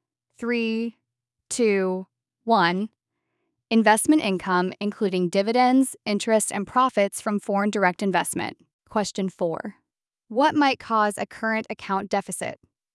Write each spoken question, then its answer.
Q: What might cause a current account deficit?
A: Low international competitiveness, strong consumer demand for imports, or an overvalued currency.